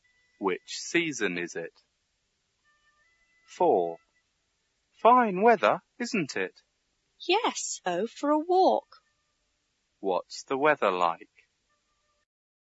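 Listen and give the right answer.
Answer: It's fine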